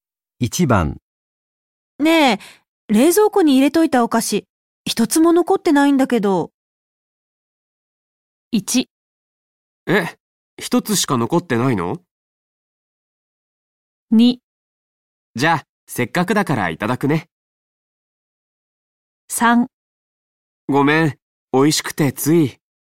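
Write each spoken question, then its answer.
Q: ねえ冷蔵庫に入れといたお菓子、一つも残ってないんだけど。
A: 3: ごめん、美味しくてつい。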